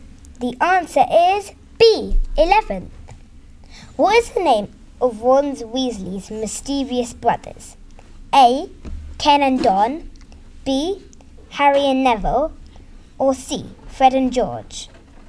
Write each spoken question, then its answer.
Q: What is the name of Ron Weasley's mischievous brothers?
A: The answer is C. Fred and George.